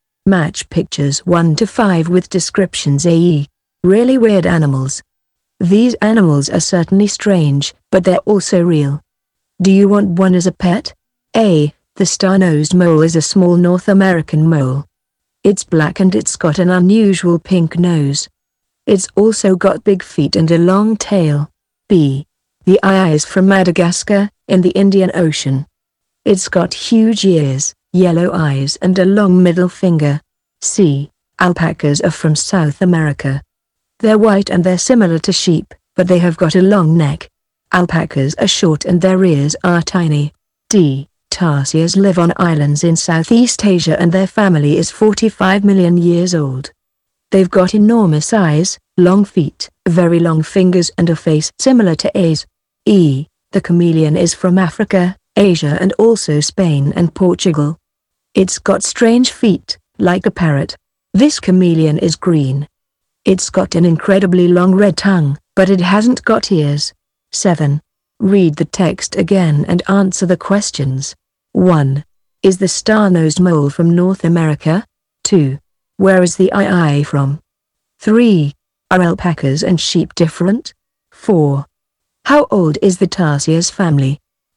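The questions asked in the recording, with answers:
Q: Is the star-nosed mole from North America?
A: Yes, it is.

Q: Where is the eye from?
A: Madagascar

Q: Are alpacas and sheep different?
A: Yes, alpacas have got a long neck.

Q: How old is the tarsiers family?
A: 45 million years old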